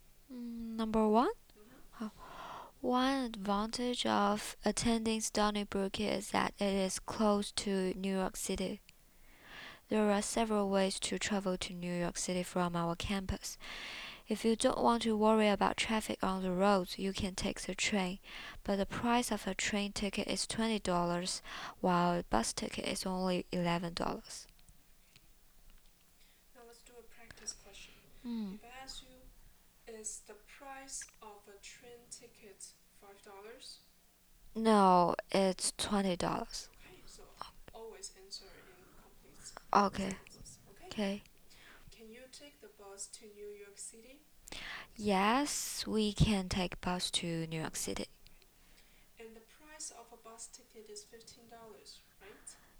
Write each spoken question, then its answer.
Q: And the price of a bus ticket is $15, right?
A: No, it is $11.